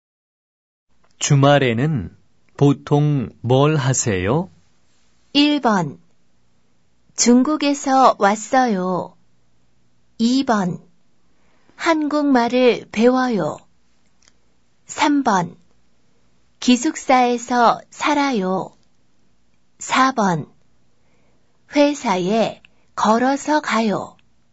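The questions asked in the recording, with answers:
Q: 주말에는 보통 뭘 하세요?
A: 2: 한국말을 배워요.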